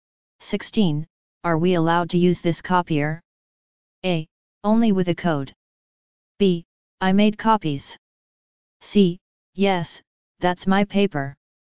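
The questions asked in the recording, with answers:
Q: Are we allowed to use this copier?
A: A: Only with a code.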